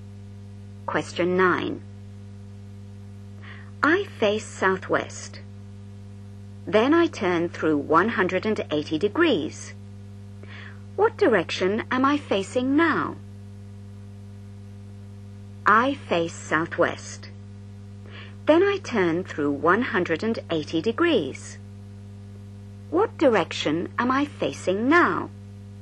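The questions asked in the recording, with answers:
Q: What direction am I facing now?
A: Northeast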